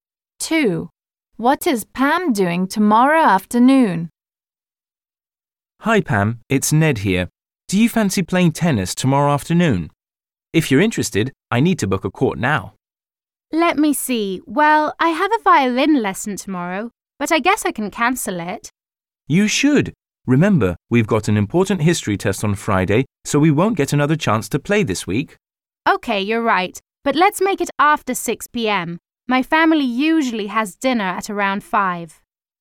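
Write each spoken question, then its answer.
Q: What is Pam doing tomorrow afternoon?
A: Playing tennis with Ned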